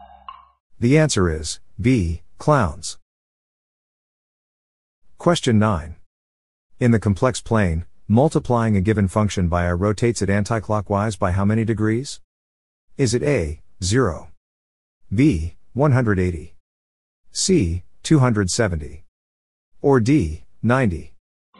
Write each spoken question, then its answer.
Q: In the complex plane, multiplying a given function by I rotates it anticlockwise by how many degrees?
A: The answer is D, 90.